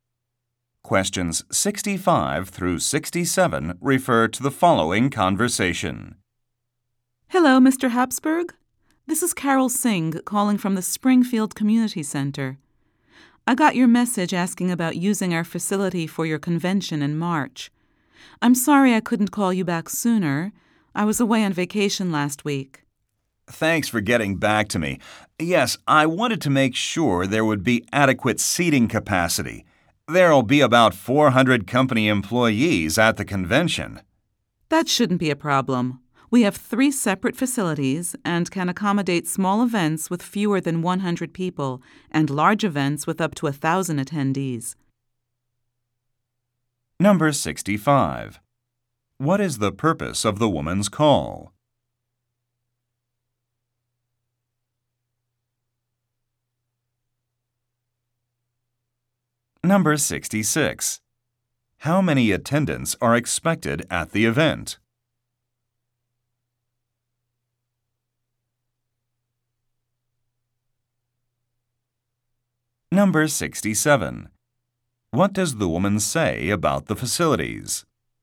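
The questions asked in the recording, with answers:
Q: What is the purpose of the woman's call?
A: To return his call about using the facility

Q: How many attendants are expected at the event?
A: About 400

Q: What does the woman say about the facilities?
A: They can hold events of under 100 to 1,000 people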